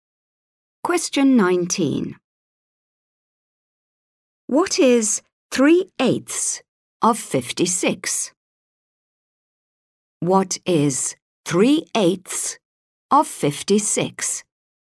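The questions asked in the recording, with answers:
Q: What is 3/8 of 56?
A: 21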